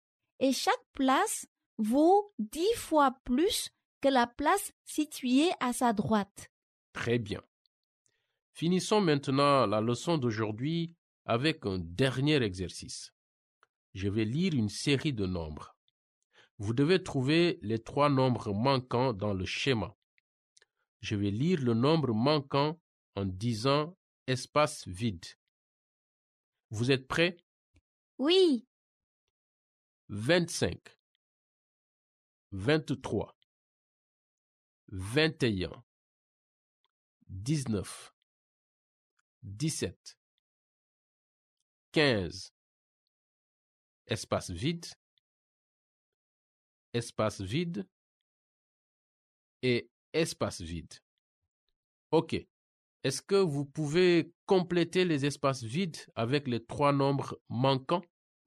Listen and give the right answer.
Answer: 13, 11 et 9.